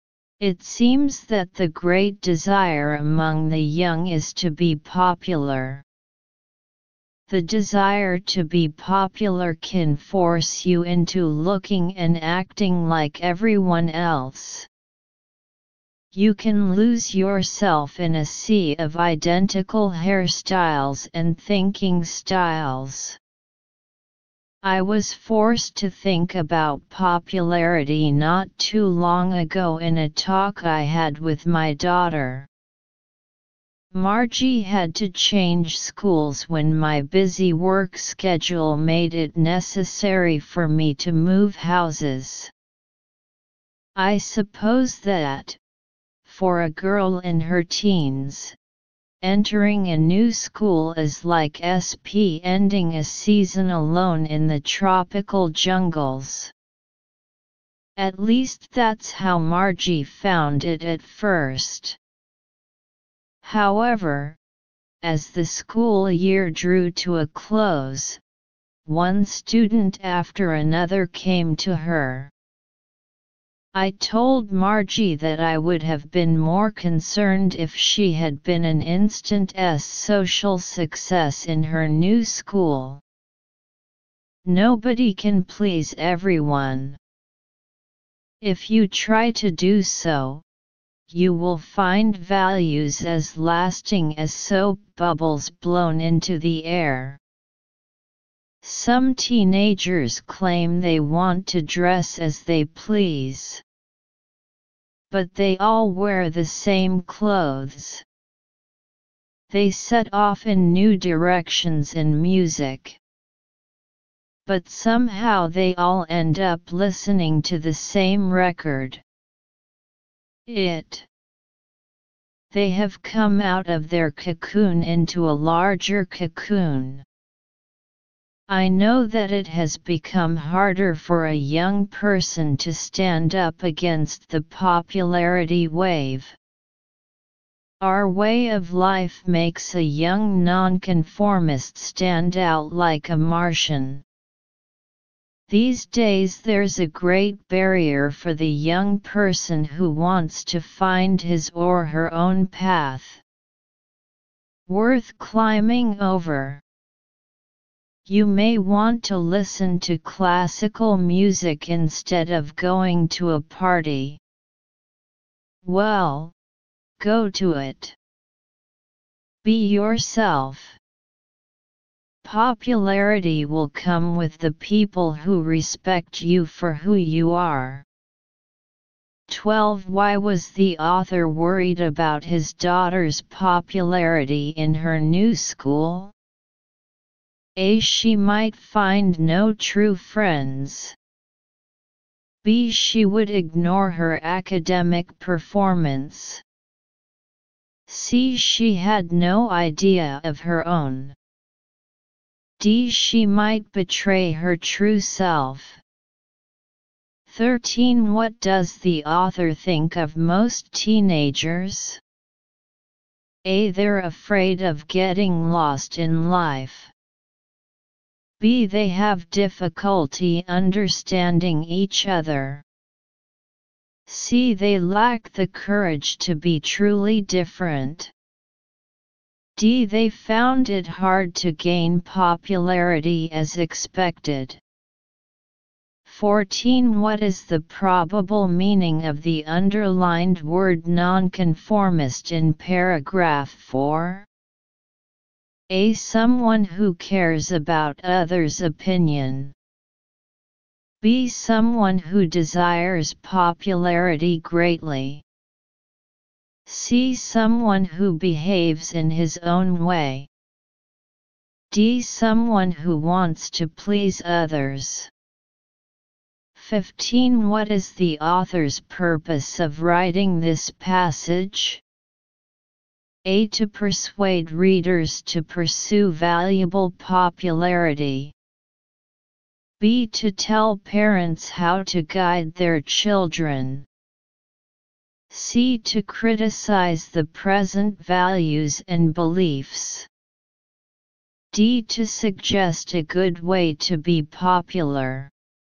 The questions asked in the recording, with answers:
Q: Why was the author worried about his daughter's popularity in her new school?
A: 12. D.

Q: What does the author think of most teenagers?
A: 13. C.

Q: What is the probable meaning of the underlined word nonconformist in paragraph 4?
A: 14. C.

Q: What is the author's purpose of writing this passage?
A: 15. A.